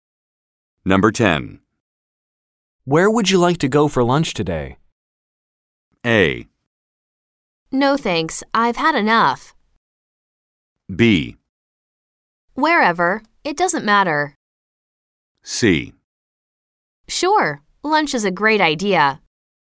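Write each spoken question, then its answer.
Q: Where would you like to go for lunch today?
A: B: Wherever, it doesn't matter.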